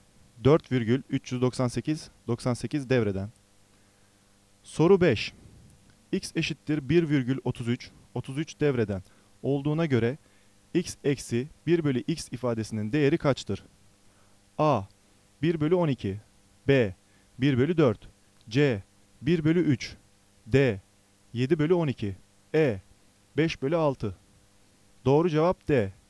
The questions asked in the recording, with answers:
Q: X eşittir 1,33, 33 devreden olduğuna göre X eksi 1 bölü X ifadesinin değeri kaçtır?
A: Doğru cevap D.